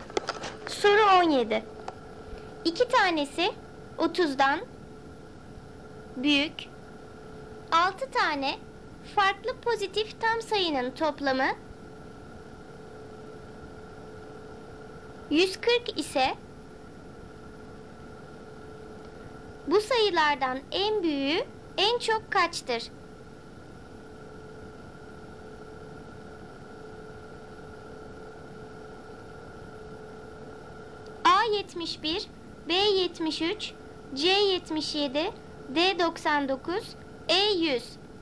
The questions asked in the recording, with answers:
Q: bu sayılardan en büyüğü en çok kaçtır?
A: Doğru cevap D 99.